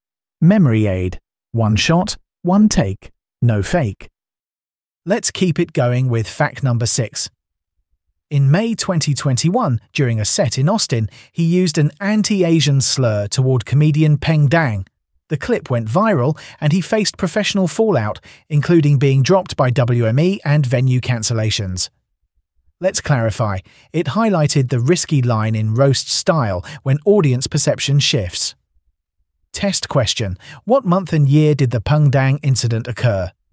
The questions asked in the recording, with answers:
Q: what month and year did the Peng Dang incident occur?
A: Correct answer, May 2021.